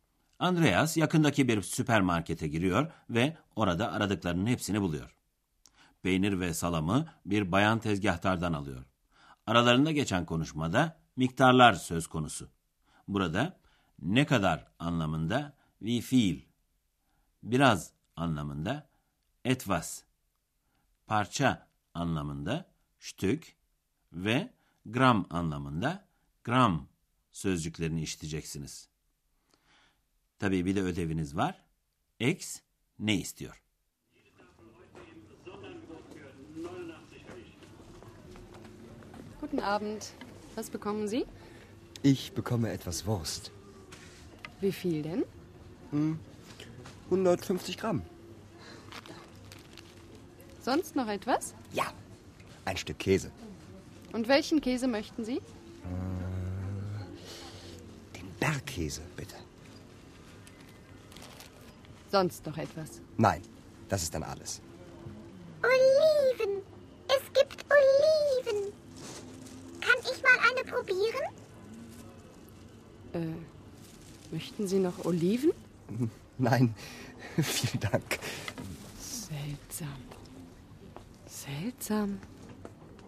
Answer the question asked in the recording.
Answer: Bir tane zeytinin tadına bakmak istedi.